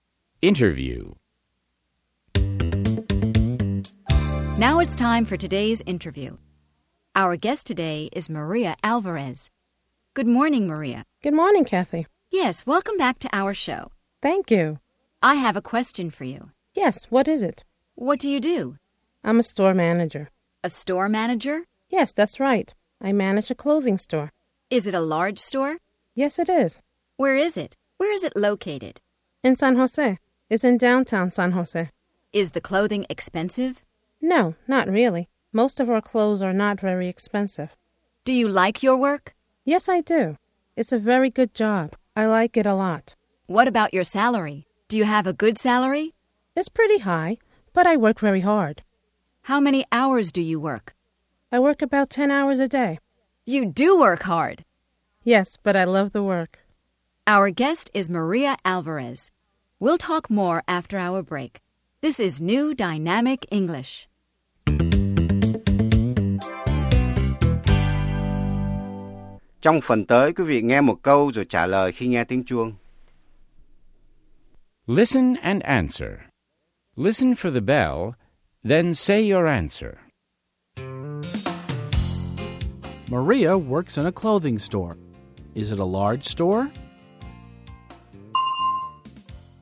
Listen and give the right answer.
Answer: Yes, it is. It's large.